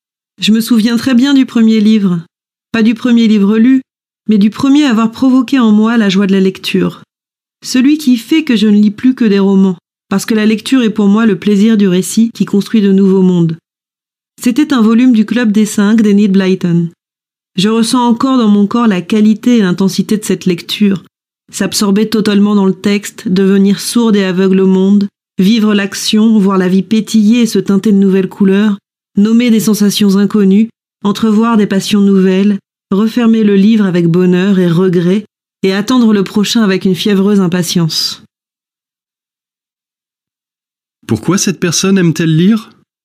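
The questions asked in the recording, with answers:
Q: Pourquoi cette personne aime-t-elle lire ?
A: Pour le plaisir du récit qui construit de nouveaux mondes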